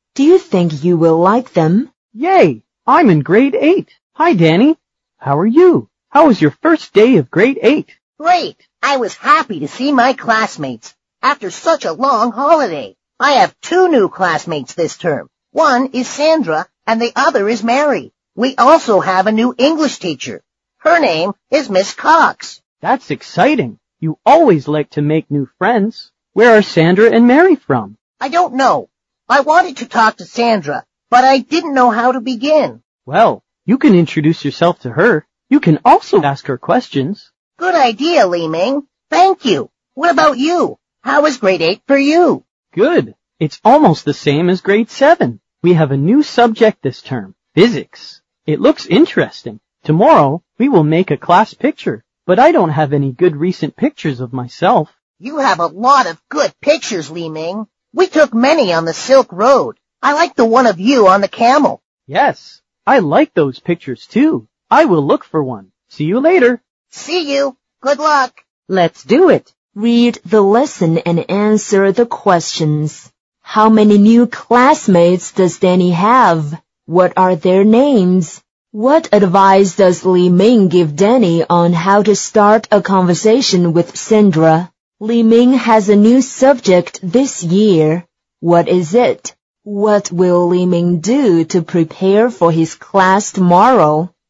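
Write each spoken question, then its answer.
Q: How many new classmates does Danny have?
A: Two

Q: What are their names?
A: Sandra and Mary

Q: What advice does Li Ming give Danny on how to start a conversation with Sandra?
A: Introduce himself to her and ask her questions

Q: What is it?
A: Physics

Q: What will Li Ming do to prepare for his class tomorrow?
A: Look for a good picture of himself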